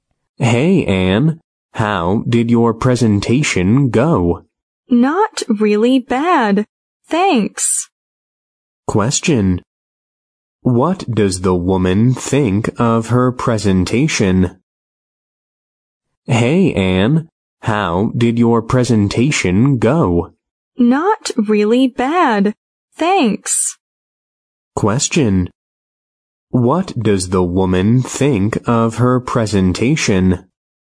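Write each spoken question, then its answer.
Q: What does the woman think of her presentation?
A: It was not bad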